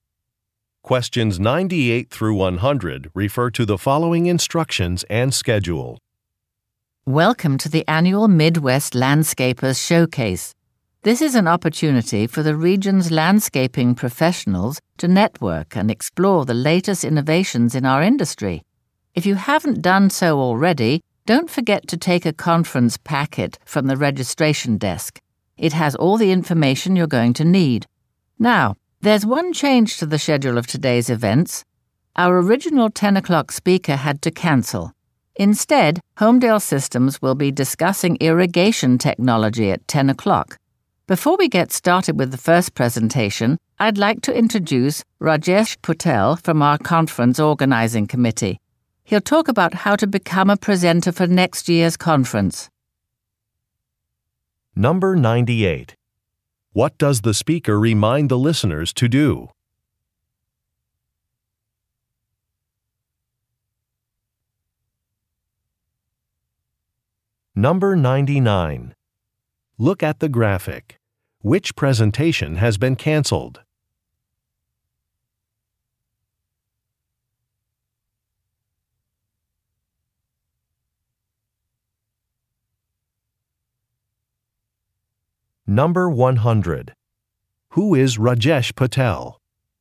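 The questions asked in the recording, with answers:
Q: What does the speaker remind the listeners to do?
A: Take a conference packet from the registration desk

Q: Who is Rajesh Patel?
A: A member of the conference organizing committee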